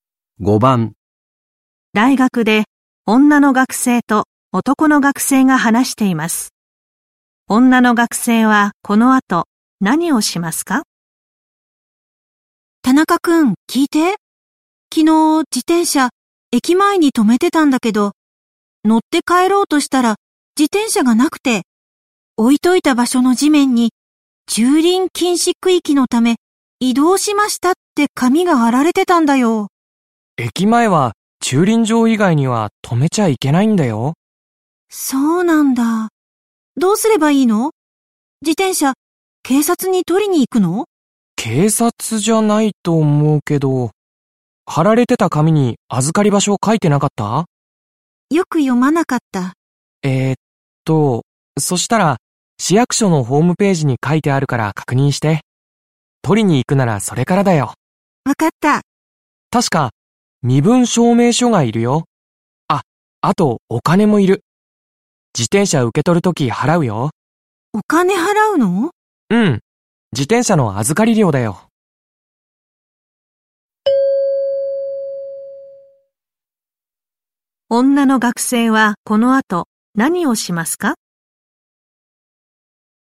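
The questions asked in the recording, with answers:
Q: 女の学生はこの後何をしますか?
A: 市役所のホームページで自転車の預かり場所を確認する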